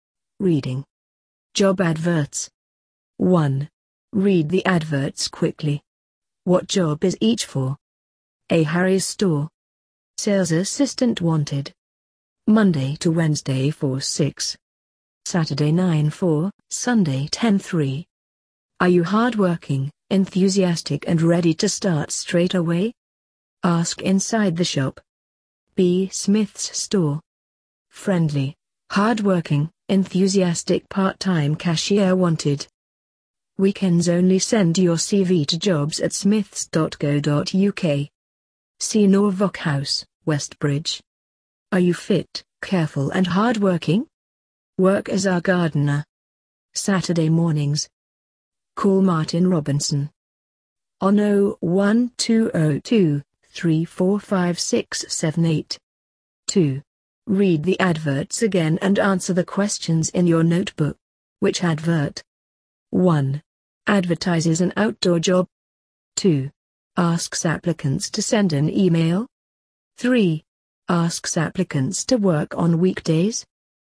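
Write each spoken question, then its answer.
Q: Asks applicants to send an email.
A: B: Smith's store

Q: Asks applicants to work on weekdays.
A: A: Harry's store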